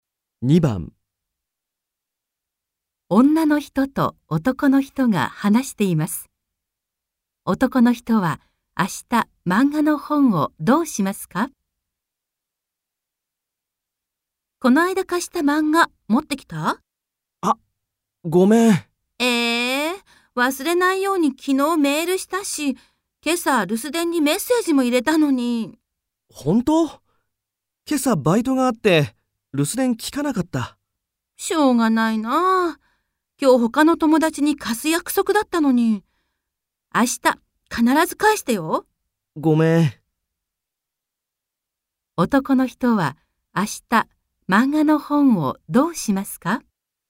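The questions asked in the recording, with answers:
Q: 男の人は明日漫画の本をどうしますか?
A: 女の人に返す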